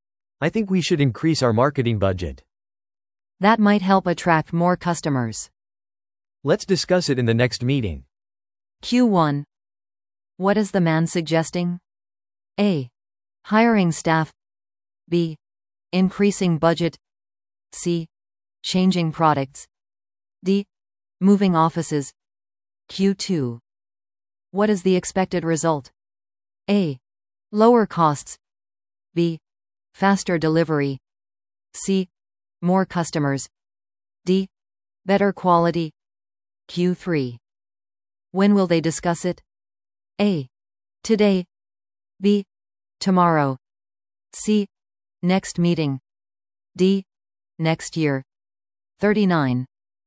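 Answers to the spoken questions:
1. B: Increasing budget.
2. C: More customers.
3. C: Next meeting.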